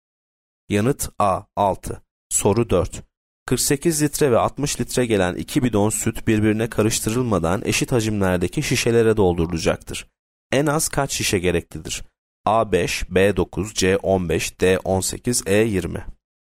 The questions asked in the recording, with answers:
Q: En az kaç şişe gereklidir?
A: Yanıt B 9.